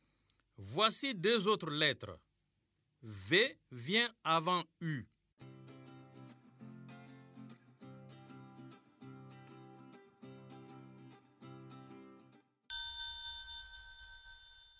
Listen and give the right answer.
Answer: Monsieur, je suis restée assise.